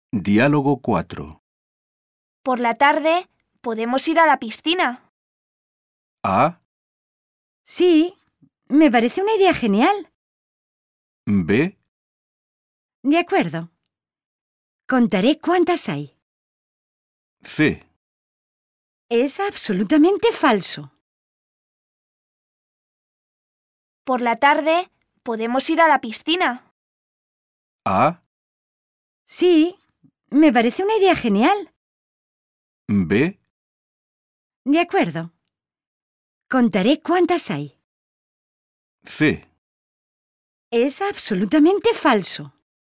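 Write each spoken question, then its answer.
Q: Por la tarde, ¿podemos ir a la piscina?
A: A: Sí, me parece una idea genial.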